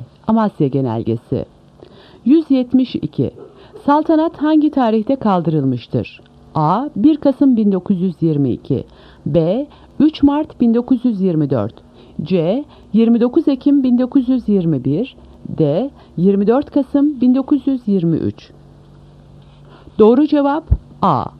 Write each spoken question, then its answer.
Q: Saltanat hangi tarihte kaldırılmıştır?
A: Doğru cevap A. 1 Kasım 1922